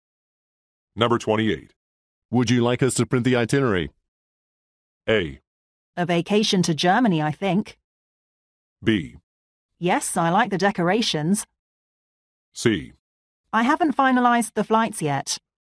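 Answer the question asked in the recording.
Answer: C: I haven't finalized the flights yet.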